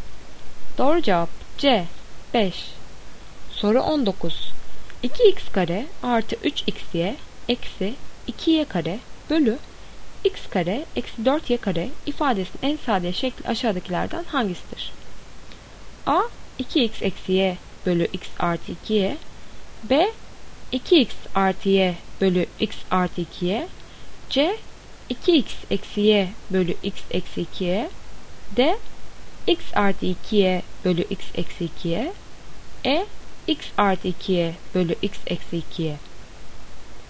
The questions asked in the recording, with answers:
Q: 2x kare artı 3xy eksi 2y kare bölü x kare eksi 4y kare ifadesinin en sade şekli aşağıdakilerden hangisidir?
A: Doğru cevap C. 2x eksi y bölü x eksi 2y.